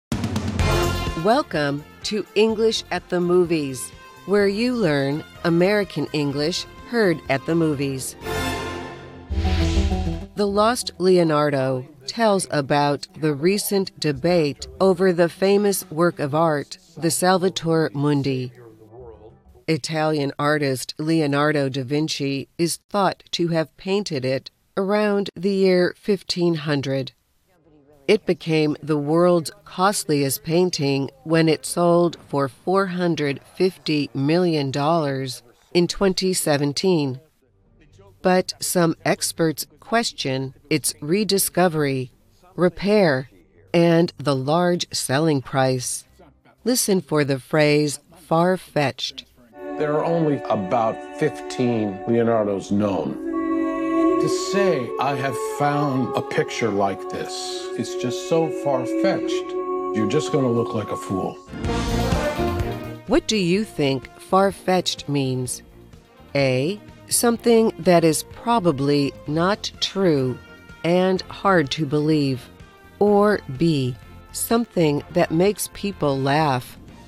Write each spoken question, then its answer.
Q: What do you think far-fetched means?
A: The answer is A. Far-fetched is something that is probably not true and hard to believe.